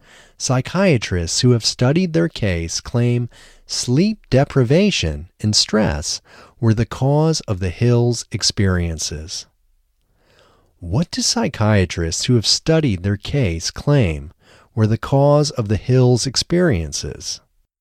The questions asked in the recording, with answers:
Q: What do psychiatrists who have studied their case claim were the cause of the Hills' experiences?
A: Psychiatrists who have studied their case claim sleep deprivation and stress were the cause of the Hills' experiences.